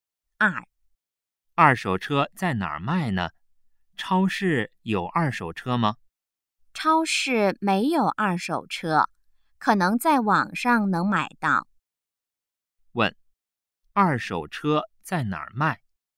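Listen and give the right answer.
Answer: 网上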